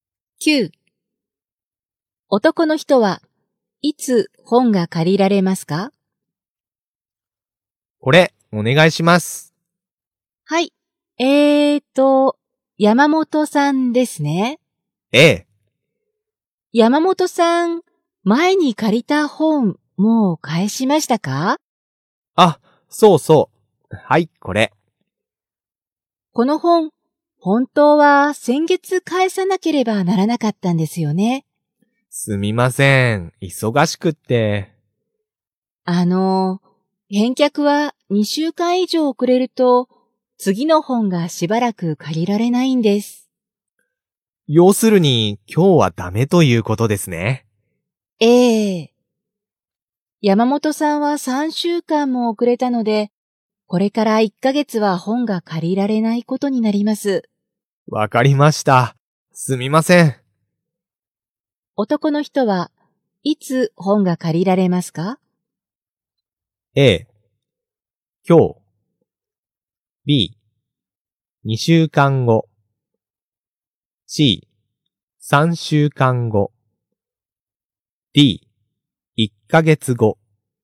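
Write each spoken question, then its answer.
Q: 男の人はいつ本が借りられますか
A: D: 1ヶ月後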